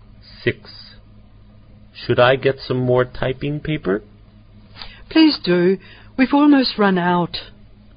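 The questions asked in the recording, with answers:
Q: What will the man do now?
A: Get some more typing paper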